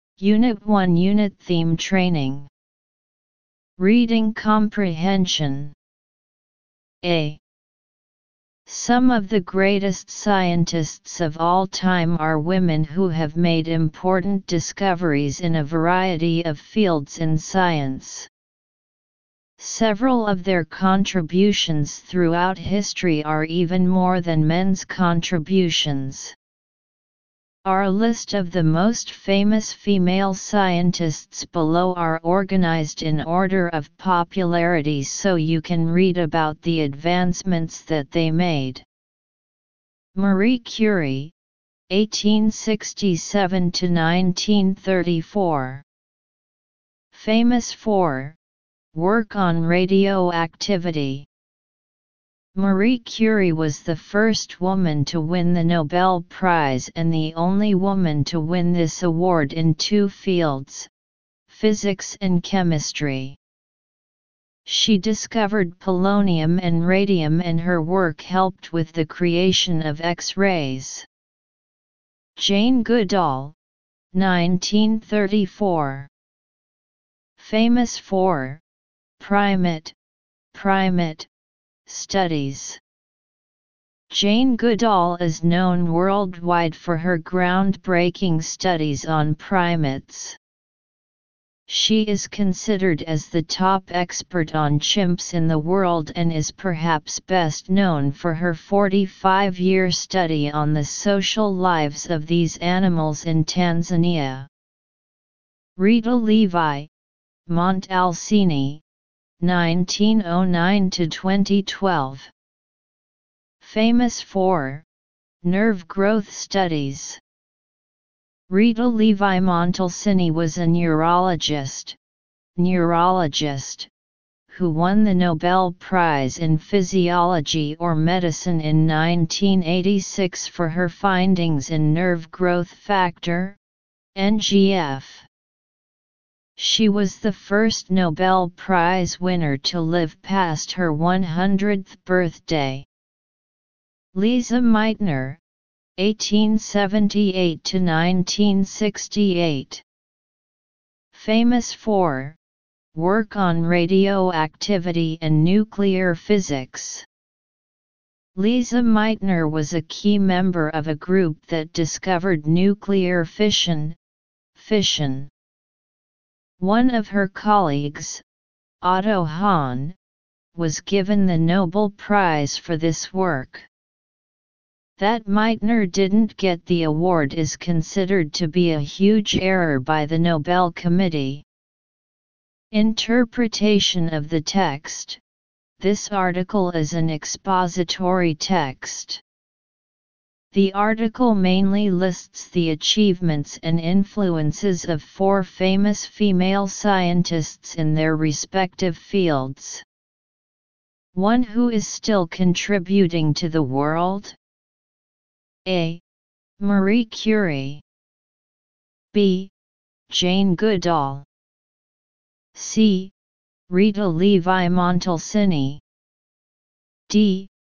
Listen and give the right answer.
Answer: Choose B